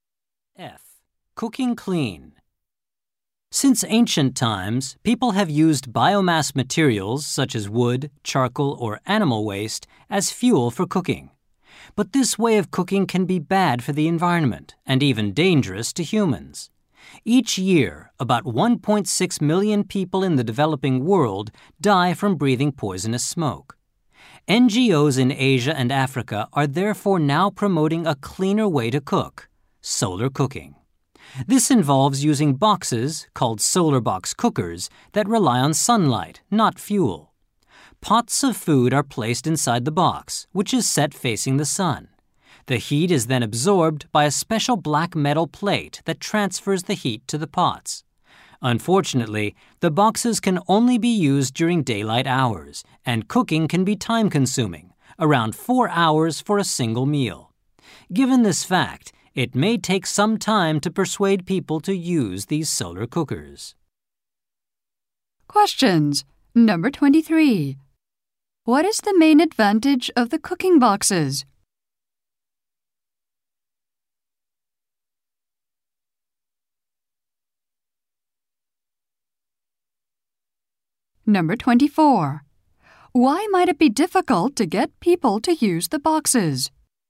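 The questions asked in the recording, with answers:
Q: What is the main advantage of the cooking boxes?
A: They use sunlight, not fuel, so they don't produce harmful smoke.

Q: Why might it be difficult to get people to use the boxes?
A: Cooking is slow and only possible in daylight.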